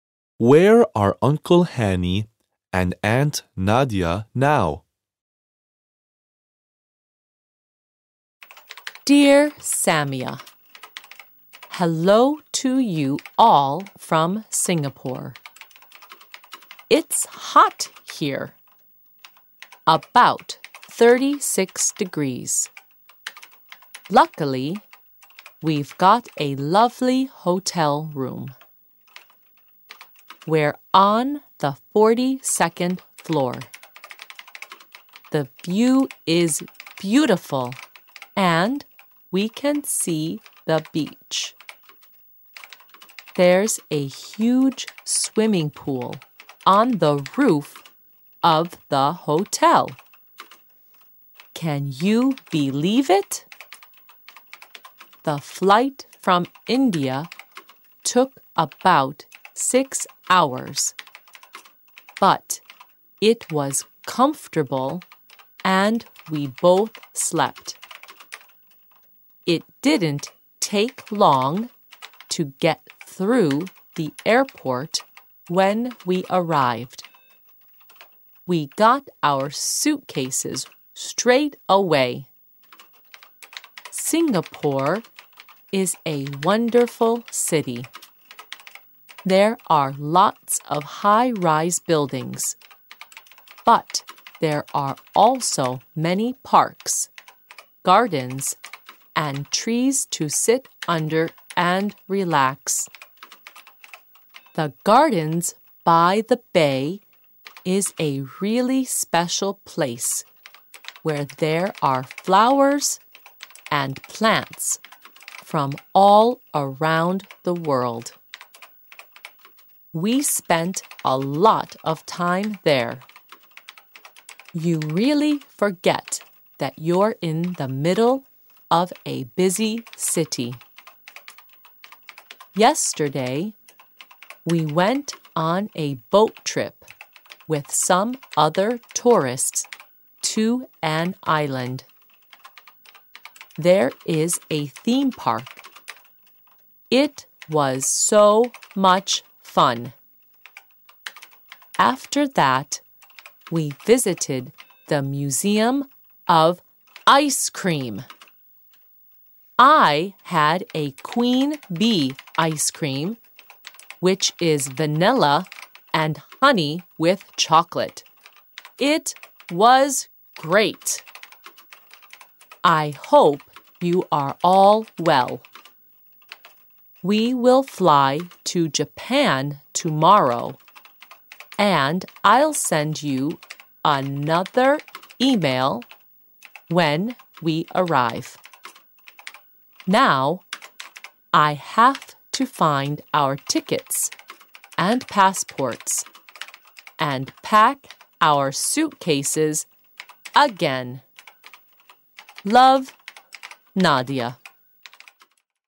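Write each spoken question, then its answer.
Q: Where are Uncle Hanny and Aunt Nadia now?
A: In Singapore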